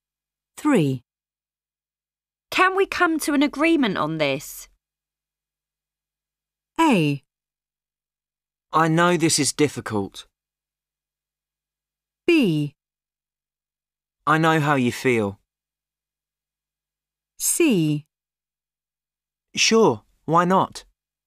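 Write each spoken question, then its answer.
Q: Can we come to an agreement on this?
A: C: Sure, why not?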